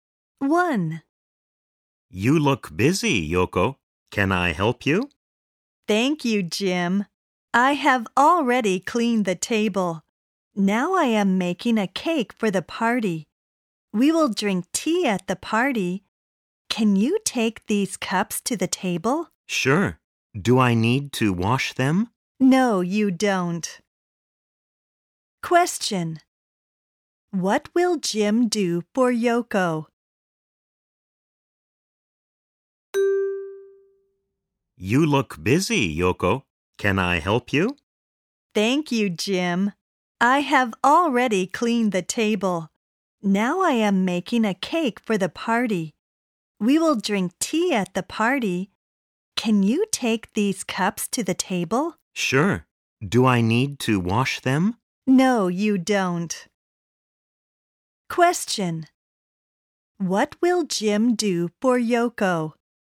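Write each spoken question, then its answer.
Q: What will Jim do for Yoko?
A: He will take the cups to the table.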